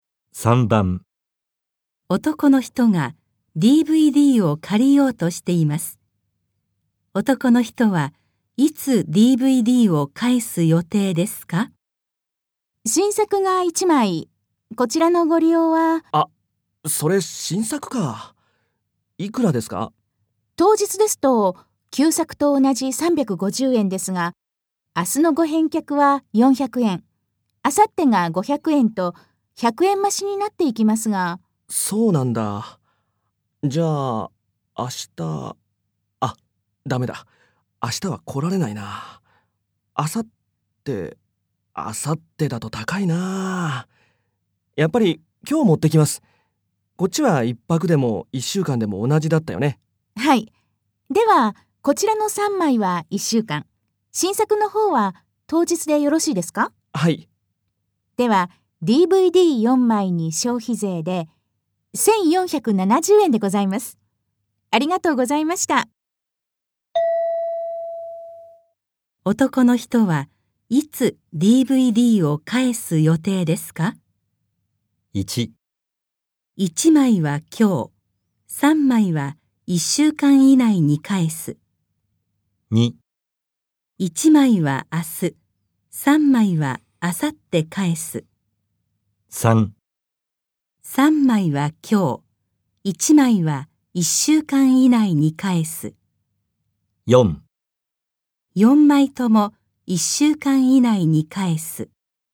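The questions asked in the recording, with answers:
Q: 男の人はいつ DVD を返す予定ですか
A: 1: 1枚は今日、3枚は1週間以内に返す。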